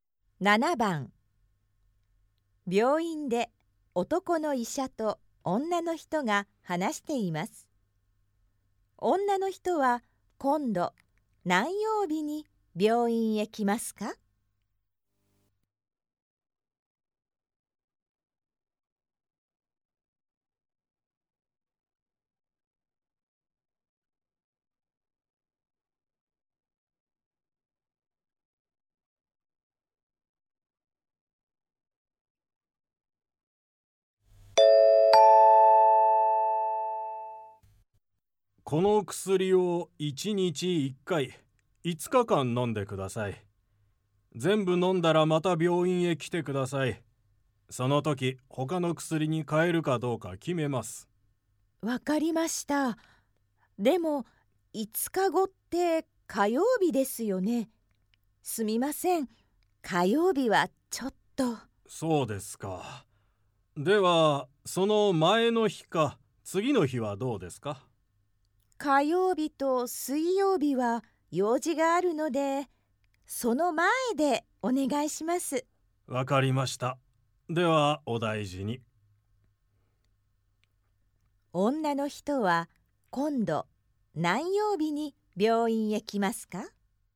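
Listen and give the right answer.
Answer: 月曜日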